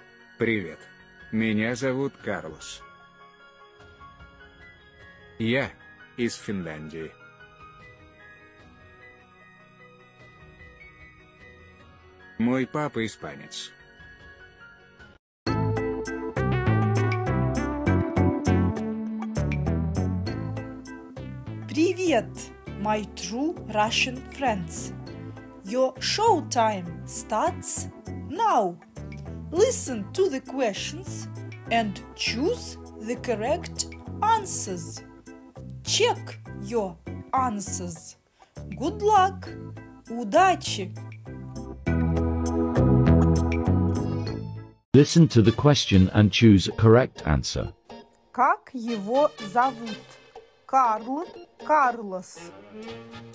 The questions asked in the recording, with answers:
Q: Как его зовут?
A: Его зовут Карлос.